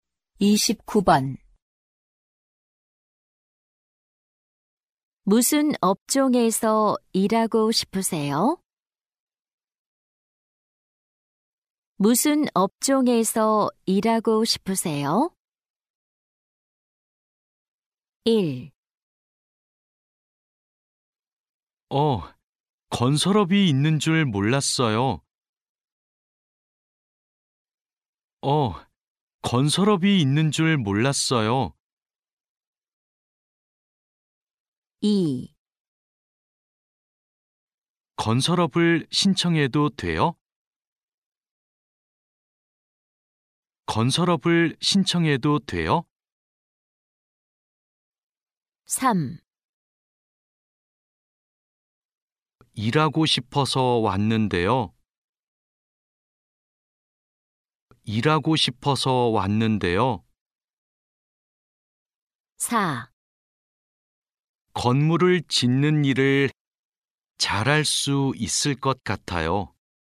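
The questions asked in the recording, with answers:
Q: 무슨 업종에서 일하고 싶으세요?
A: 4: 건물을 짓는 일을 잘할 수 있을 것 같아요.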